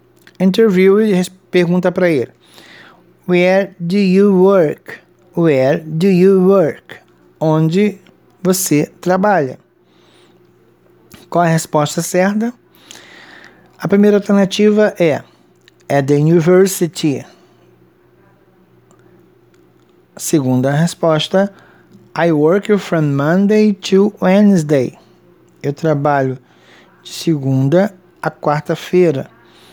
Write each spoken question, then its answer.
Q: Where do you work?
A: Isso, at the university é a resposta certa.